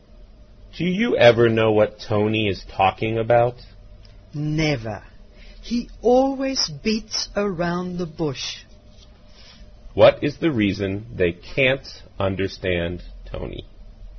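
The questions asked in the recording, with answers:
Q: What is the reason they can't understand Tony?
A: He always beats around the bush.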